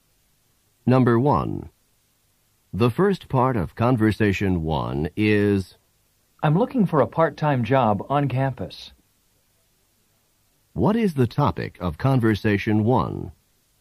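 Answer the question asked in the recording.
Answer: Finding a part-time job on campus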